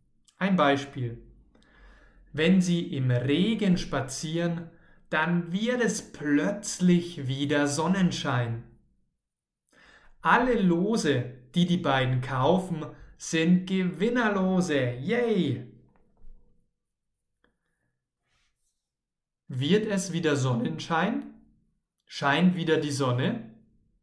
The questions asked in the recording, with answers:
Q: Wird es wieder Sonnenschein?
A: Ja, es wird wieder Sonnenschein.